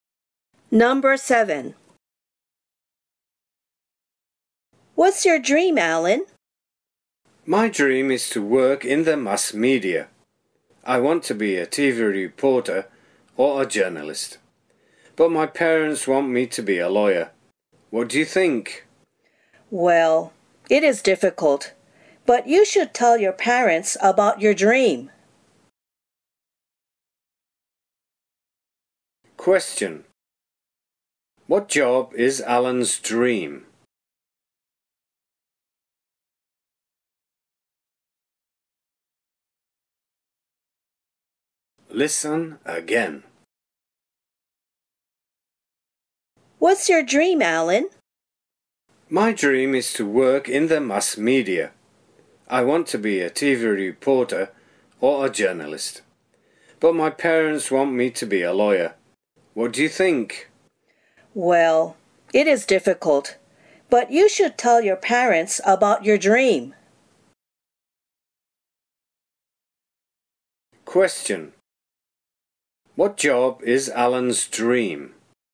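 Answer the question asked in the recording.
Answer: A TV reporter or a journalist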